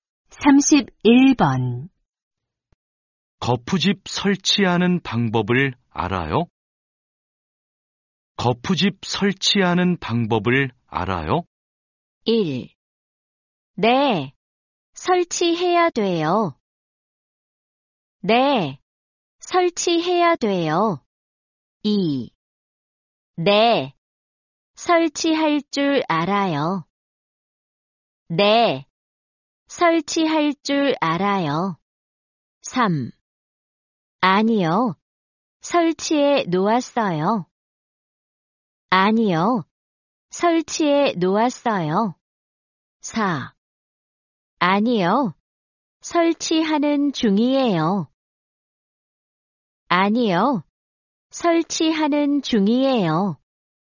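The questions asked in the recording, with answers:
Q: 거푸집 설치하는 방법을 알아요?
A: 2: 네, 설치할 줄 알아요.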